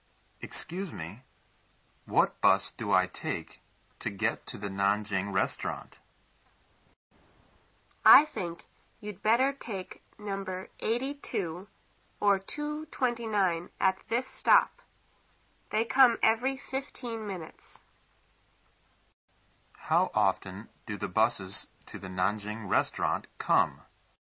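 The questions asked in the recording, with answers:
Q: How often do the buses to the Nanjing restaurant come?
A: Every 15 minutes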